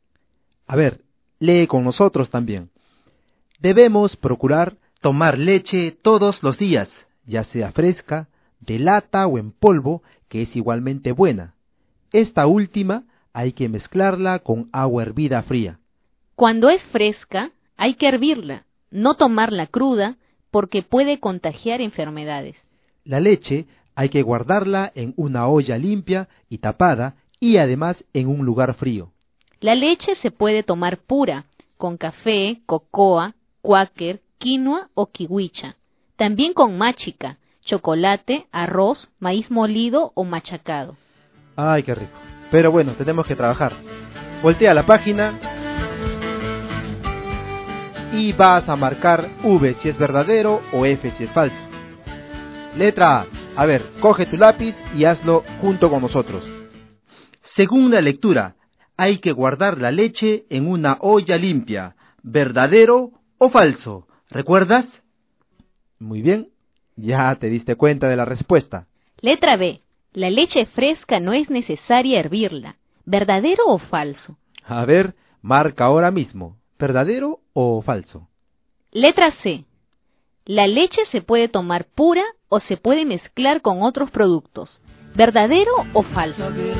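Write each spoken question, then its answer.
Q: Según la lectura, hay que guardar la leche en una olla limpia.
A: Verdadero

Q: La leche fresca no es necesaria hervirla.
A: Falso

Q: La leche se puede tomar pura o se puede mezclar con otros productos.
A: Verdadero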